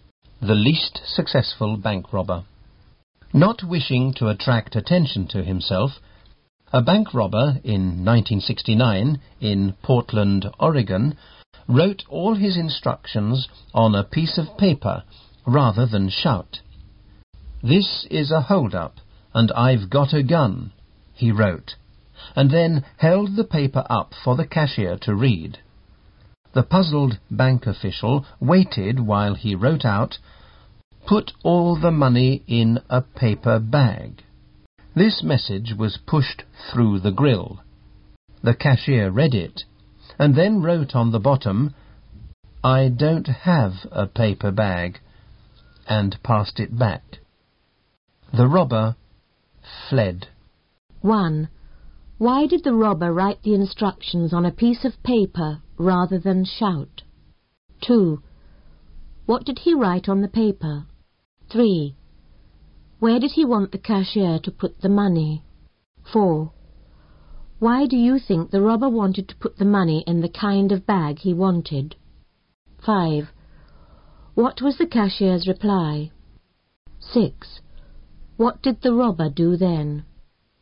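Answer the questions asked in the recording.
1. He did not wish to attract attention to himself.
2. "This is a hold-up, and I've got a gun."
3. In a paper bag.
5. "I don't have a paper bag."
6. He fled.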